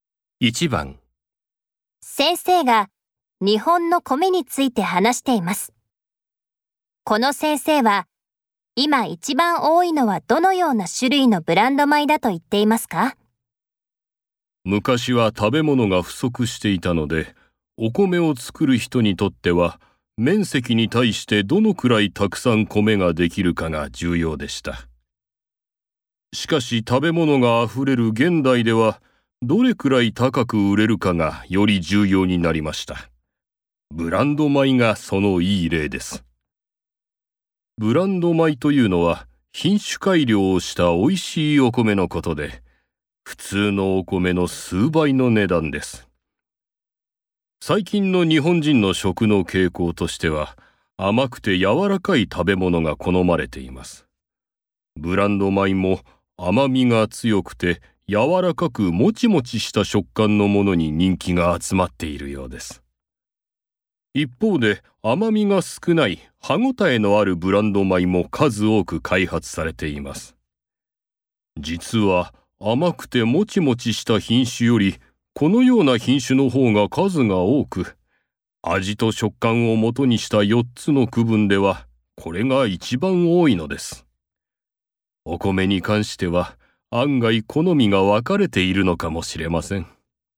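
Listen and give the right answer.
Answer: 甘みが少なく歯ごたえのあるブランド米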